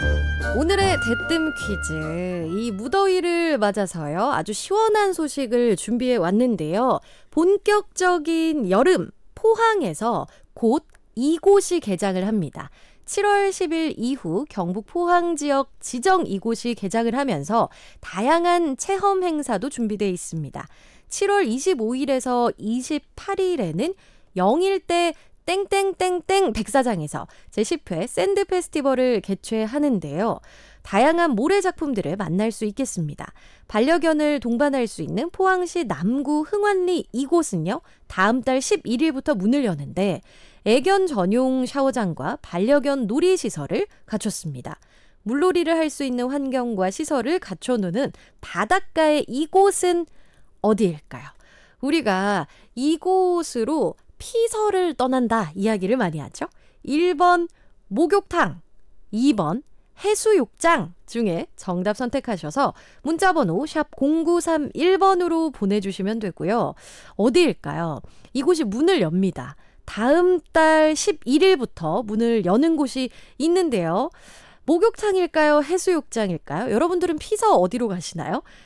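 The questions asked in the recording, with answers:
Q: 물놀이를 할 수 있는 환경과 시설을 갖춰놓는 바닷가의 이곳은 어디일까요?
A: 2: 해수욕장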